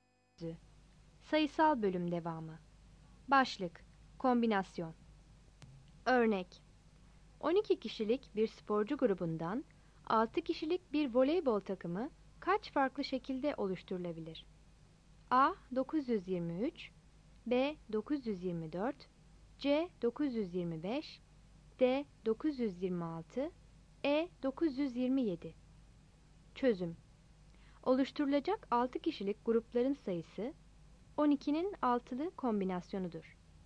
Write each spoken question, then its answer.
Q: 12 kişilik bir sporcu grubundan 6 kişilik bir voleybol takımı kaç farklı şekilde oluşturulabilir?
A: Yanıt B'dir.